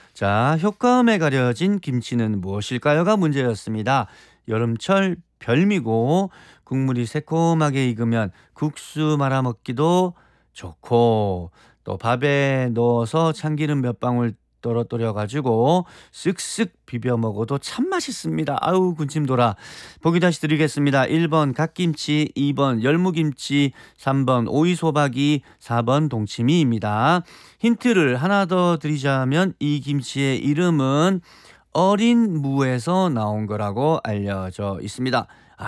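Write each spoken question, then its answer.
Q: 효과음에 가려진 김치는 무엇일까요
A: 2: 열무김치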